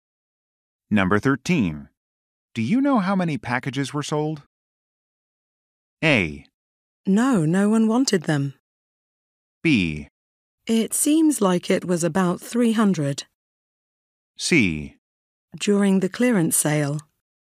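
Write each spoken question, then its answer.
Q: Do you know how many packages were sold?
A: B: It seems like it was about 300.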